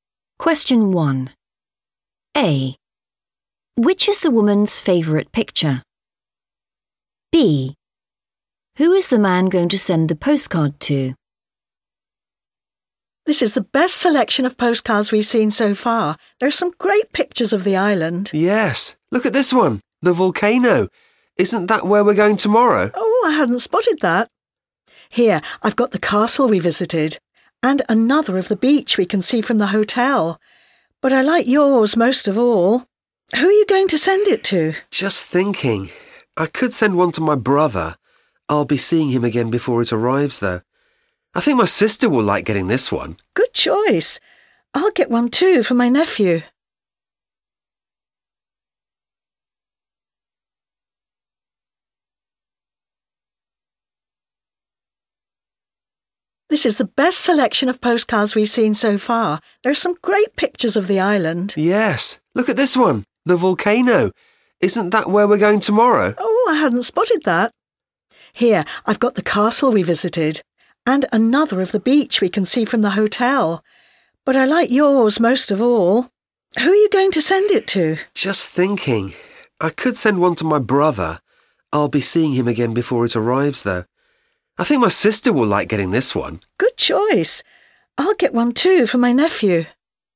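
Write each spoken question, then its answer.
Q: Which is the woman's favourite picture?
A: the volcano

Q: Who is the man going to send the postcard to?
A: his sister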